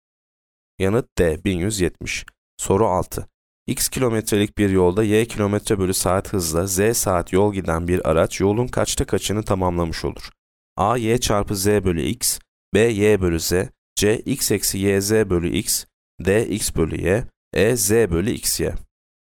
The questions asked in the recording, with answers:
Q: X kilometrelik bir yolda Y kilometre bölü saat hızla Z saat yol giden bir araç yolun kaçta kaçını tamamlamış olur?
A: Yanıt A, Y, Z bölü X.